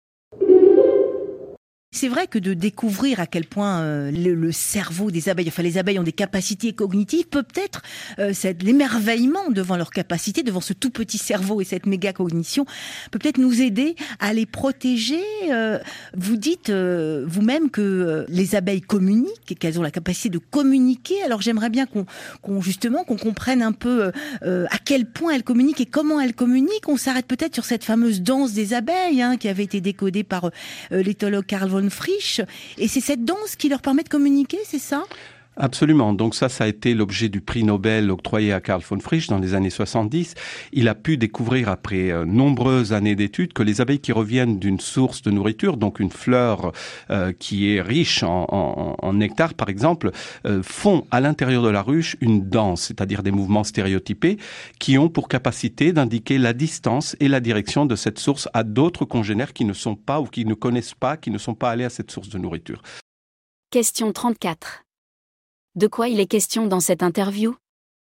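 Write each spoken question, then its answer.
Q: De quoi il est question dans cette interview ?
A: De la communication des abeilles (leur danse)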